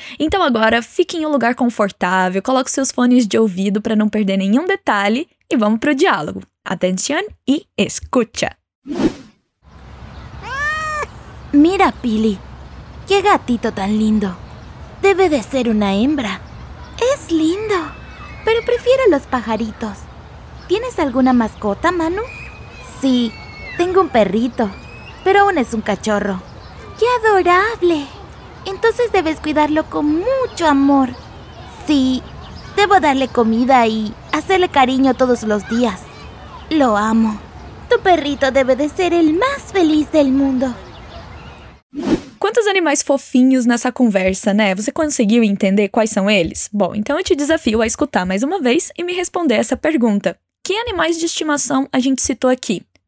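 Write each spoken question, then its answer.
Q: Que animais de estimação a gente citou aqui?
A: Gato (gatito), pássaros (pajaritos) e cachorro (perrito)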